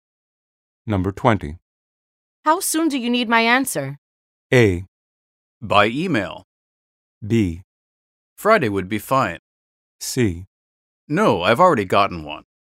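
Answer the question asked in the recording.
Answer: B: Friday would be fine.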